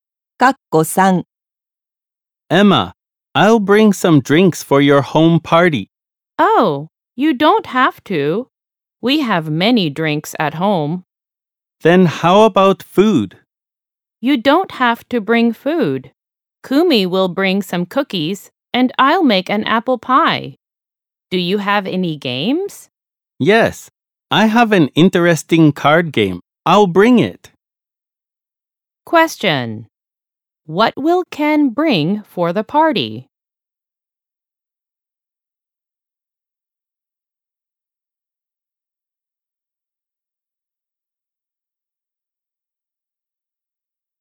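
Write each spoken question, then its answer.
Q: What will Ken bring for the party?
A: A card game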